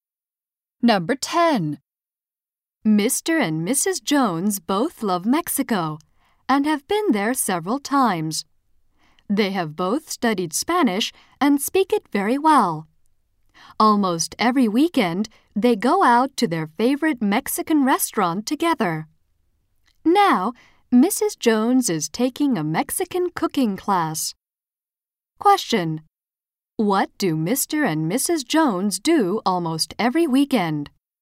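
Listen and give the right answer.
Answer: They go to their favorite Mexican restaurant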